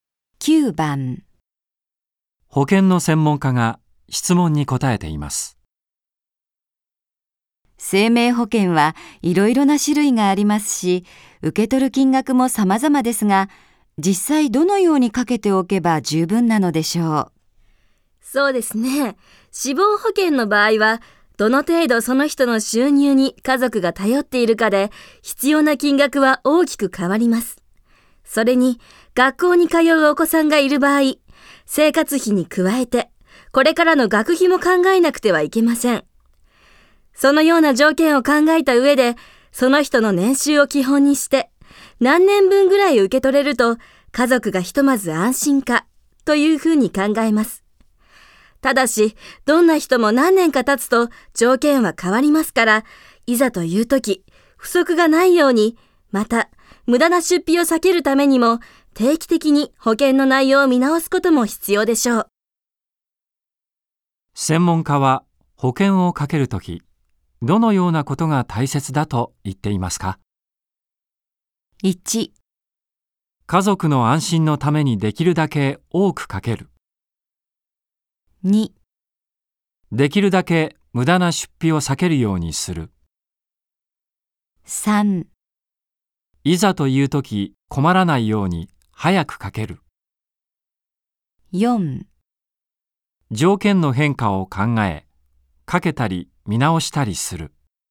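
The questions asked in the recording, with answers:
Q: 専門家は保険をかけるとき、どのようなことが大切だと言っていますか ?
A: 4: 条件の変化を考え、かけたり見直したりする。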